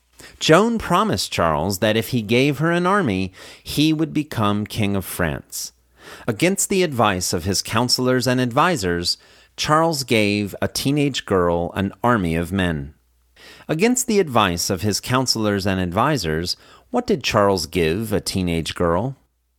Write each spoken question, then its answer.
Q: Against the advice of his counselors and advisors, what did Charles give a teenage girl?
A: Against the advice of his counselors and advisors, Charles gave a teenage girl an army of men.